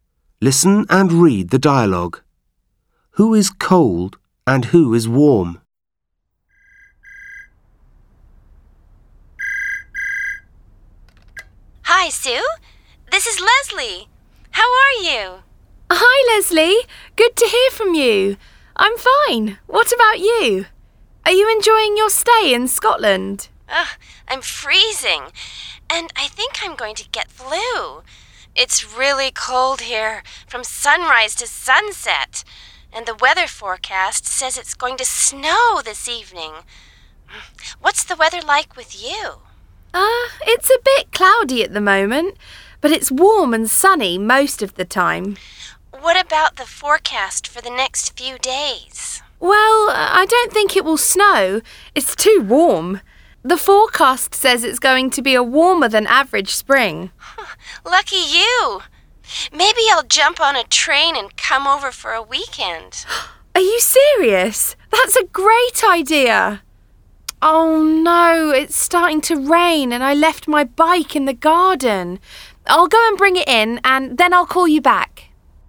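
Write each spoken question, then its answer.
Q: Who is cold and who is warm?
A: Leslie is cold (in Scotland); Sue is warm.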